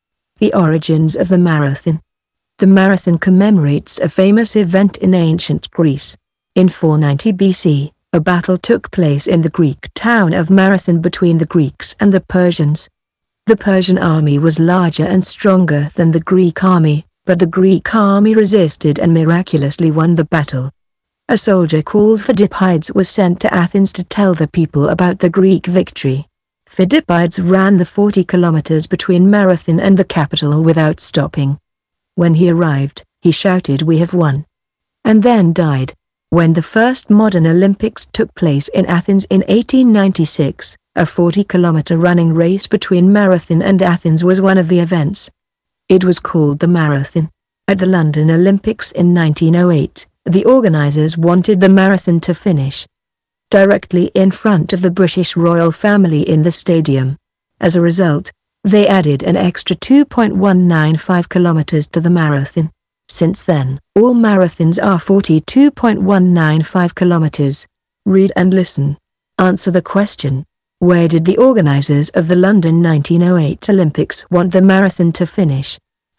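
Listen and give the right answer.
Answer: Directly in front of the British royal family in the stadium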